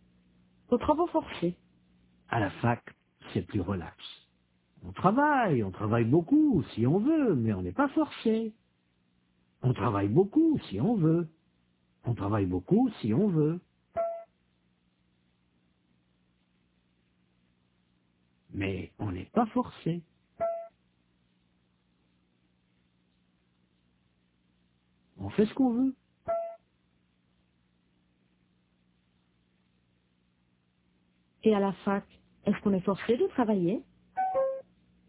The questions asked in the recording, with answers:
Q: Et à la fac, est-ce qu'on est forcé de travailler?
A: Non, on fait ce qu'on veut.